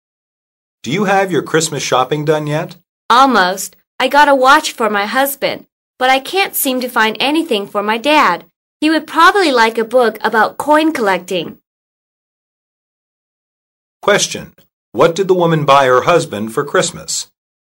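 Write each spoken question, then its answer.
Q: What did the woman buy her husband for Christmas?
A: A watch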